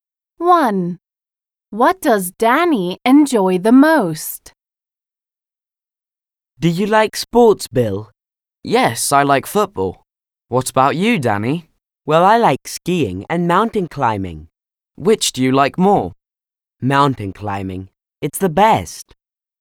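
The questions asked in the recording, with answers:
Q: What does Danny enjoy the most?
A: Mountain climbing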